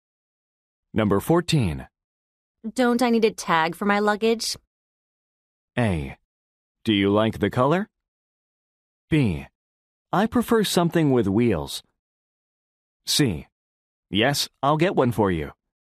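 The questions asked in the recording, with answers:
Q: Don't I need a tag for my luggage?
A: C: Yes, I'll get one for you.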